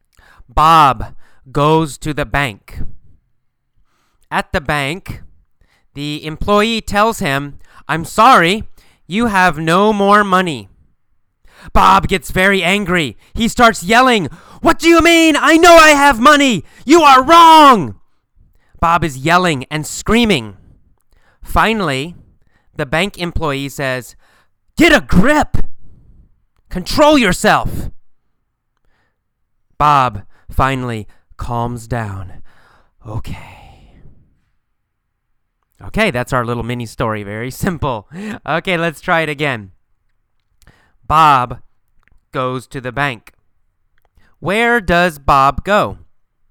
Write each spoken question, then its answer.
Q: Where does Bob go?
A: Well, Bob goes to the bank.